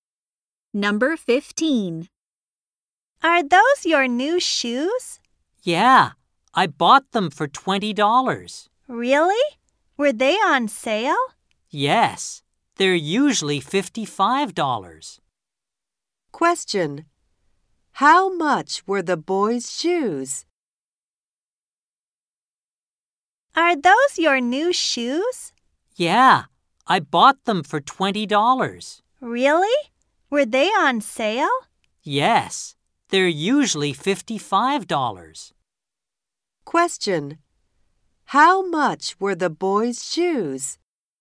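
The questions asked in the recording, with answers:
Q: How much were the boys' shoes?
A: $20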